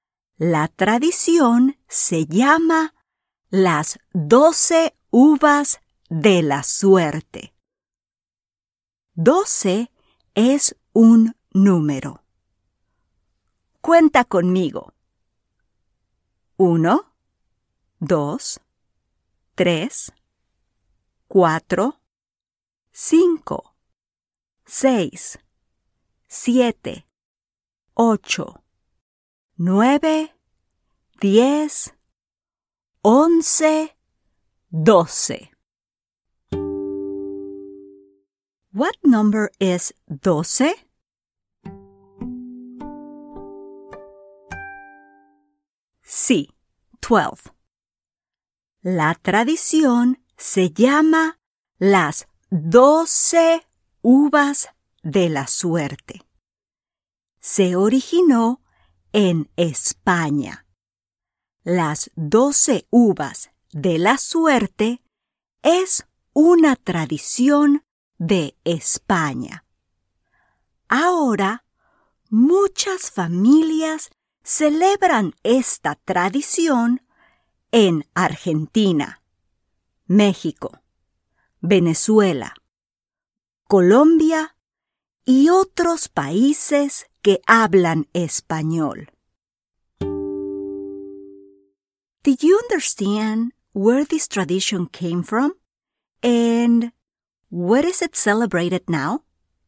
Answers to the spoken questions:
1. Originalmente, se celebraba la tradición en España, en Spain.
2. Ahora se celebra en Argentina, México, Venezuela, Colombia y otros países.